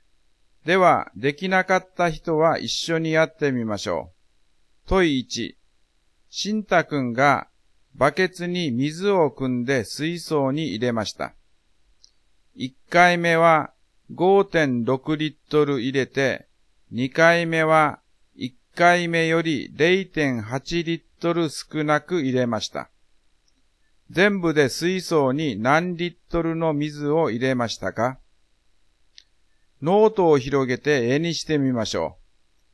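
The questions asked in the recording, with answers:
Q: 全部で水槽に何リットルの水を入れましたか?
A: 10.4リットル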